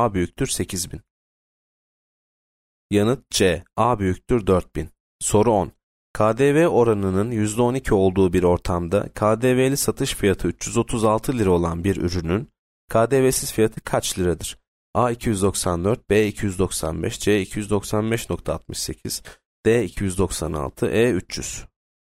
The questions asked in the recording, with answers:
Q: KDV oranının %12 olduğu bir ortamda KDV'li satış fiyatı 336 lira olan bir ürünün KDV'siz fiyatı kaç liradır?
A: E 300.